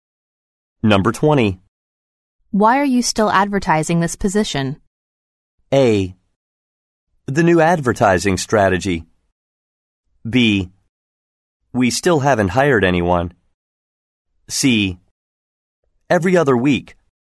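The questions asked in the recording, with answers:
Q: Why are you still advertising this position?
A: B: We still haven't hired anyone.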